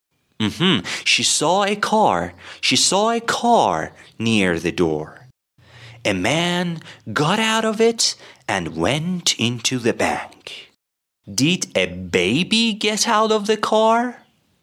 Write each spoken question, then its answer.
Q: Did a baby get out of the car?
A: Of course not. A baby can't drive.